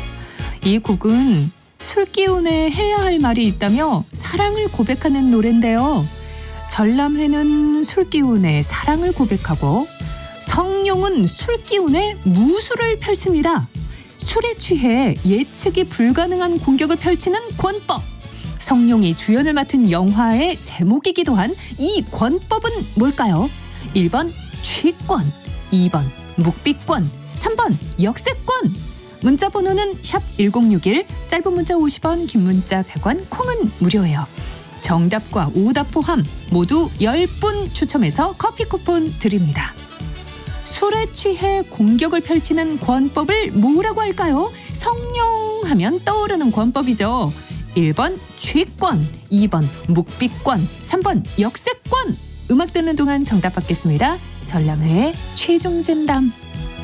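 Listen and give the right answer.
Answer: 1: 취권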